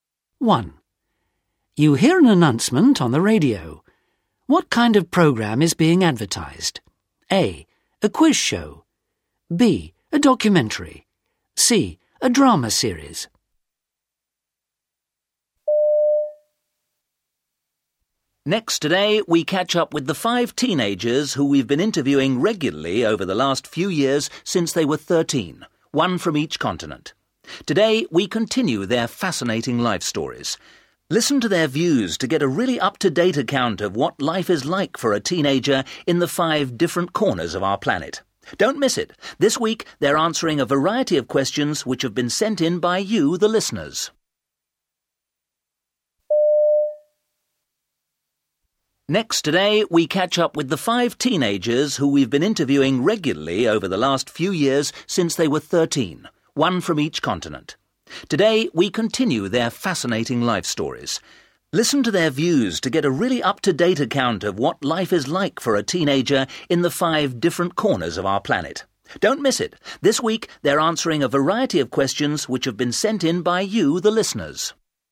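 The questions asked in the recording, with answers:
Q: What kind of program is being advertised?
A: B: A documentary.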